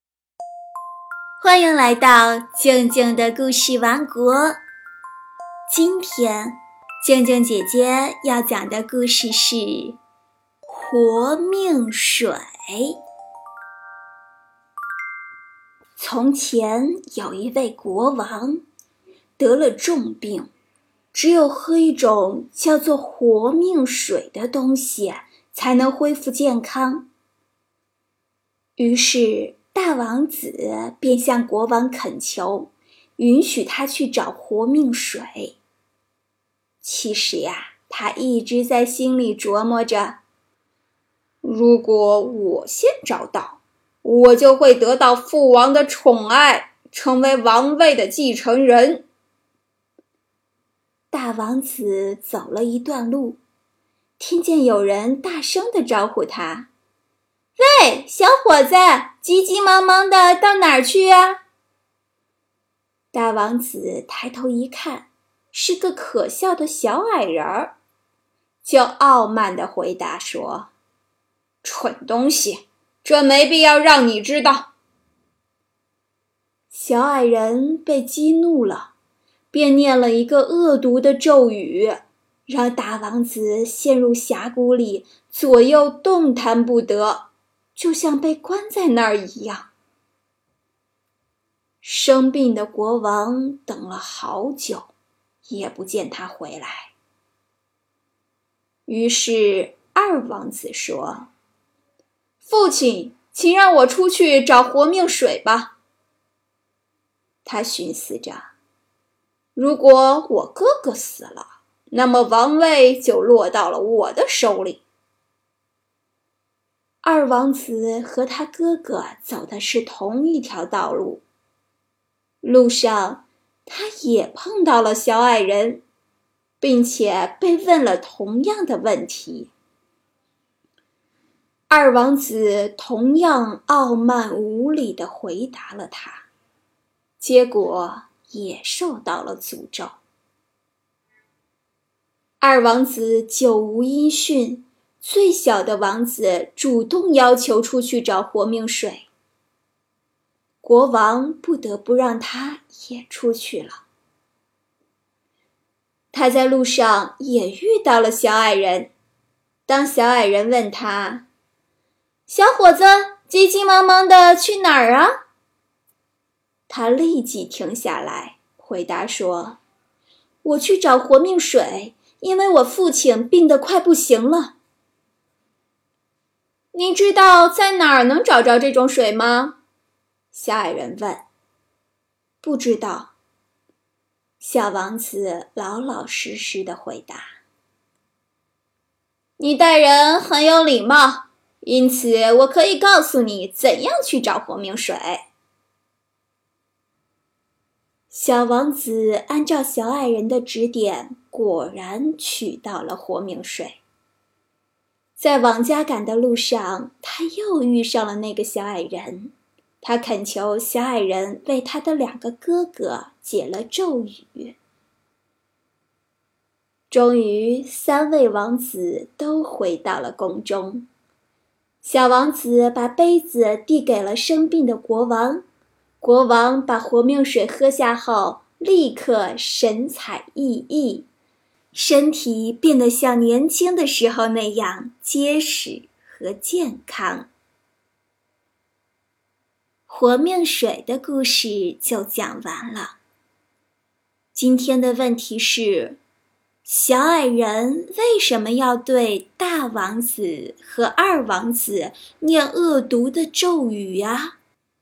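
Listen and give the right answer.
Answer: 因为他们对小矮人傲慢无礼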